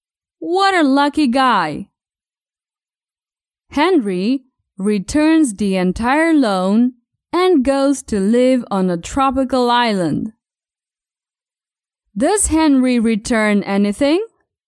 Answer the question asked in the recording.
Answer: Yes, Henry returns the loan.